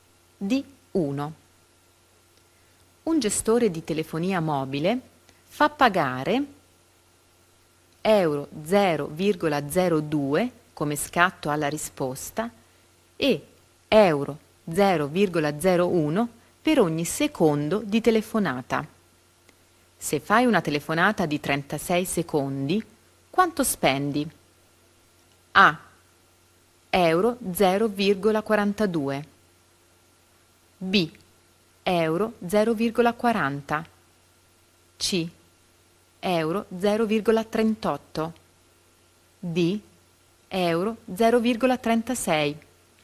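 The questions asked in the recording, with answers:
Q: Se fai una telefonata di 36 secondi, quanto spendi?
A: C: Euro 0,38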